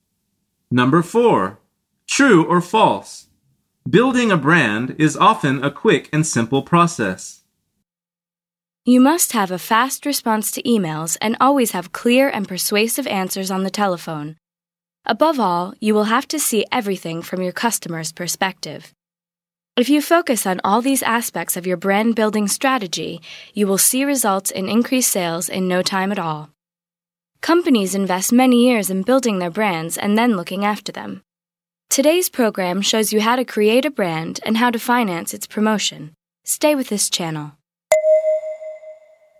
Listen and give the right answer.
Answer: The answer is false.